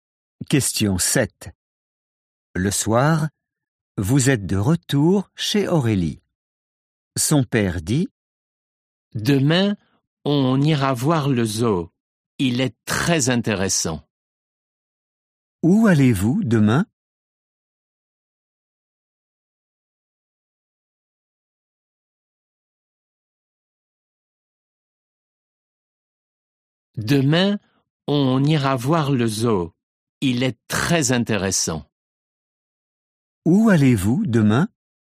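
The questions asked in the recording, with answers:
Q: Où allez-vous demain?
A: Au zoo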